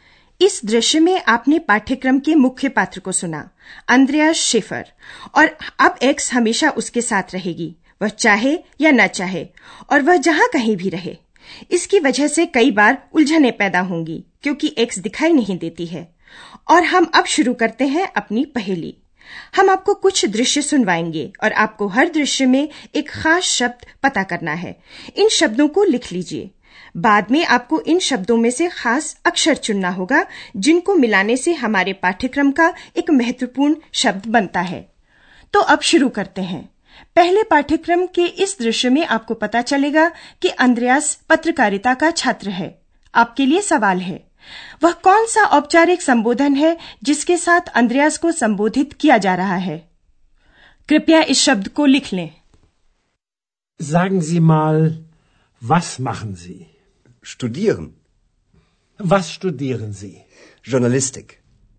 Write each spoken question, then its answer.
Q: वह कौन सा औपचारिक संबोधन है जिसके साथ अंद्रयास को संबोधित किया जा रहा है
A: वह है आप जी